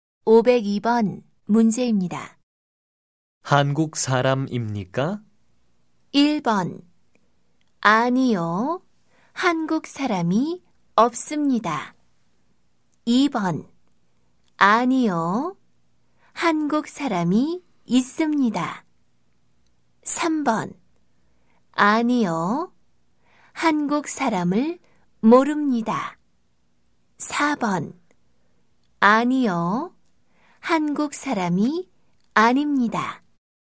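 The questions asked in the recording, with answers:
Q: 한국 사람입니까?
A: 4: 아니요. 한국 사람이 아닙니다.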